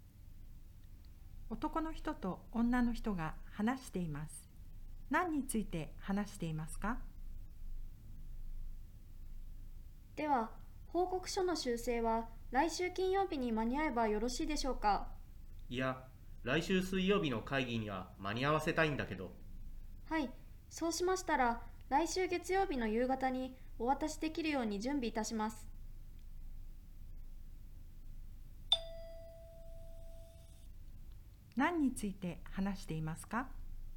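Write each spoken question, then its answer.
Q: 何について話していますか?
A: 報告書の修正をいつまでに渡すか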